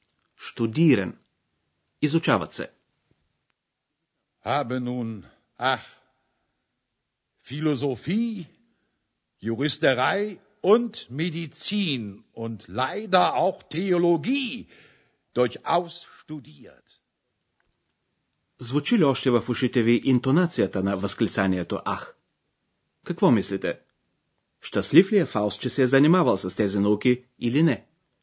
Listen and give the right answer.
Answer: Не. Той е нещастен.